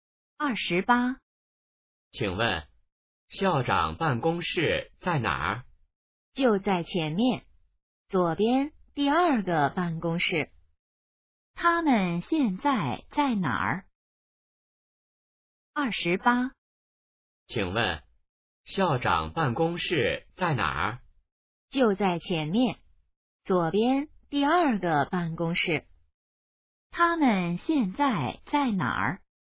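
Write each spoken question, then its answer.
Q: 他们现在在哪儿?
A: 学校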